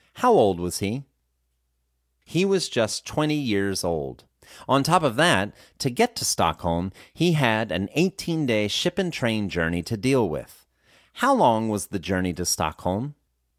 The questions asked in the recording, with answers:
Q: How long was the journey to Stockholm?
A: The journey to Stockholm took 18 days.